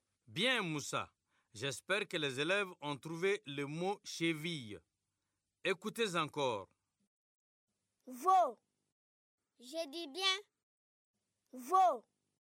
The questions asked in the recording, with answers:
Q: Veau.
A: Chevaux.